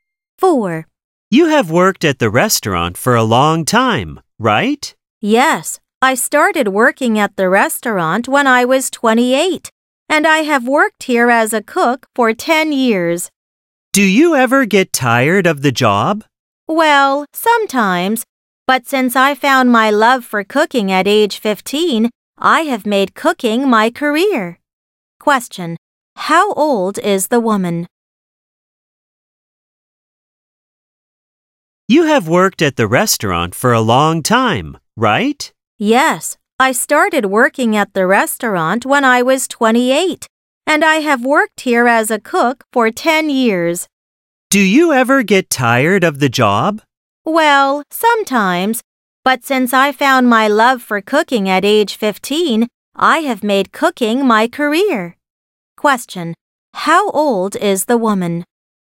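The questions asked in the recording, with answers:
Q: Question. How old is the woman?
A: 38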